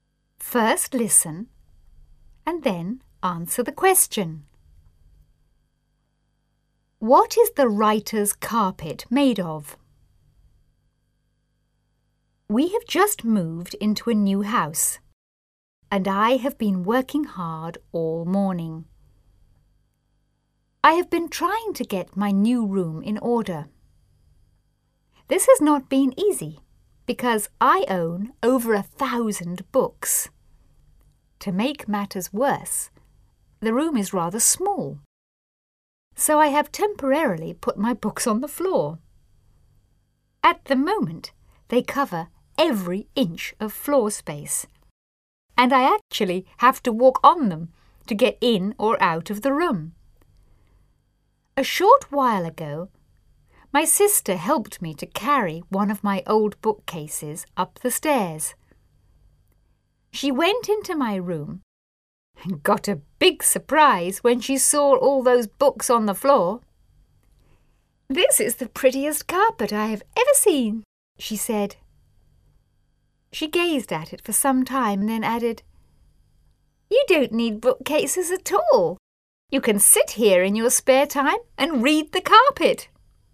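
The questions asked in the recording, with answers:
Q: What is the writer's carpet made of?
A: Books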